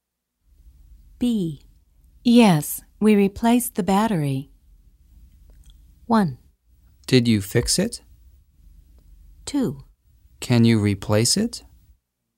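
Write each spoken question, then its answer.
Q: Yes, we replaced the battery.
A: 1: Did you fix it?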